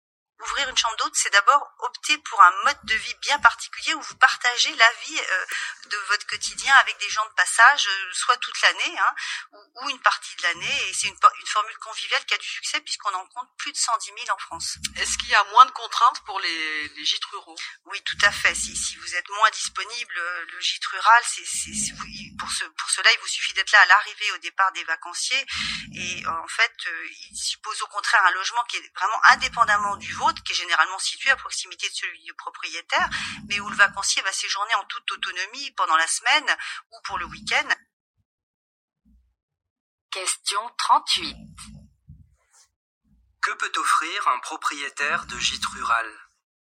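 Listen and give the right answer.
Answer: Un logement indépendant où le vacancier séjourne en autonomie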